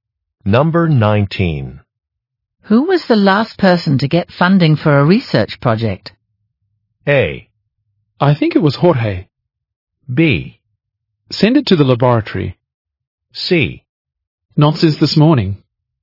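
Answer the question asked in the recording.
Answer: A: I think it was Jorge.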